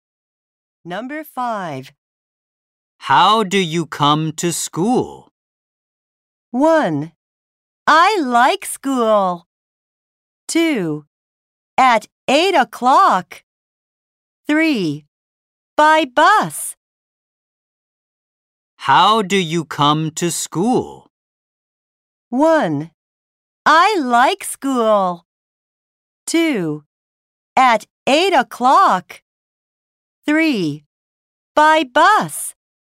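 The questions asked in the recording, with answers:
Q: How do you come to school?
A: 3: By bus.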